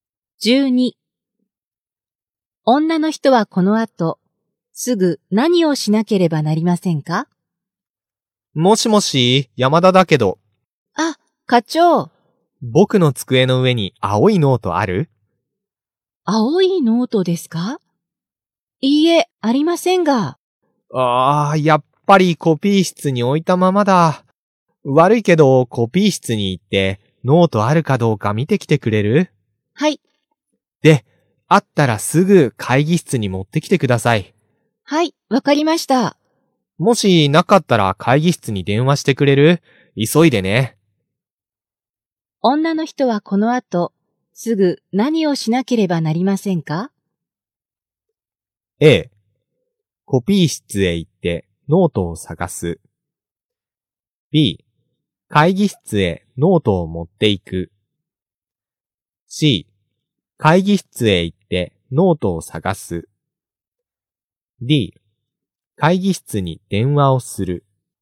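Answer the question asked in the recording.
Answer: A: コピー室へ行ってノートを探す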